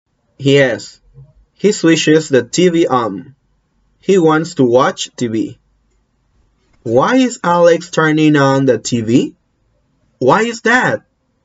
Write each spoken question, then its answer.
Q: Why is Alex turning on the TV?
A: Because he wants to watch TV.